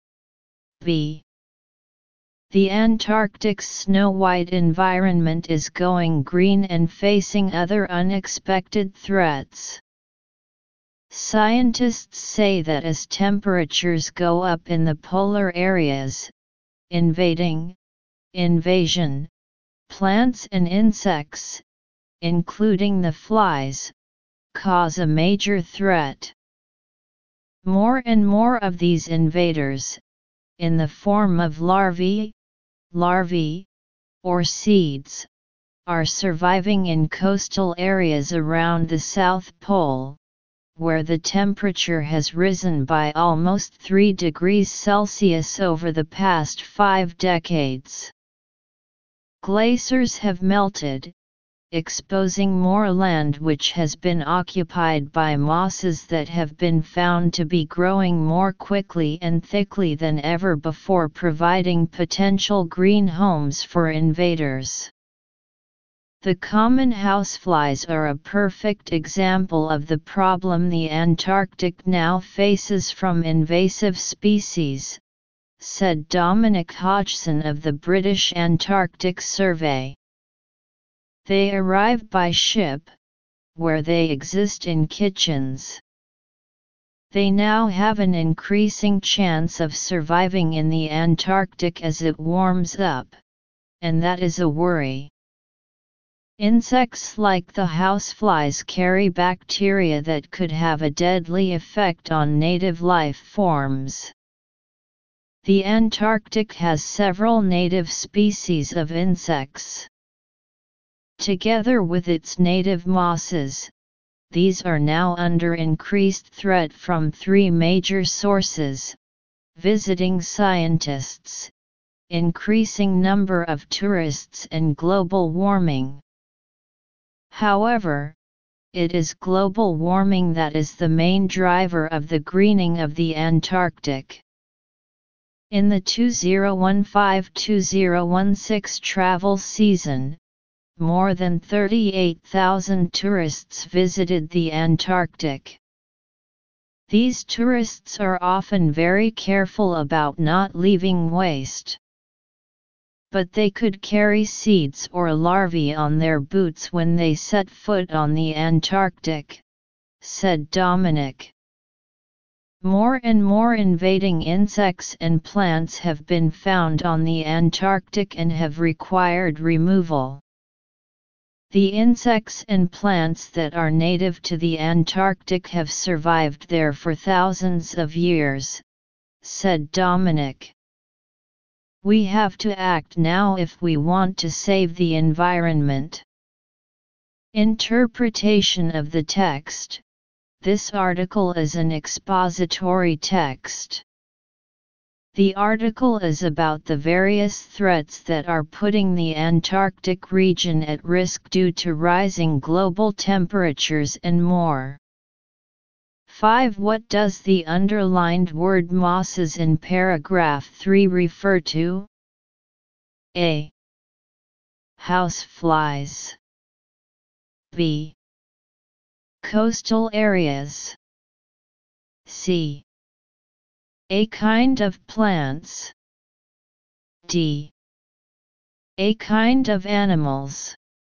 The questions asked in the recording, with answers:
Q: What does the underlined word mosses in paragraph 3 refer to?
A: Choose C